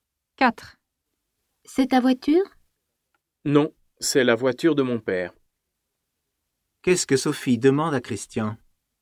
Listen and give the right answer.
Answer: Elle lui demande si c'est sa voiture.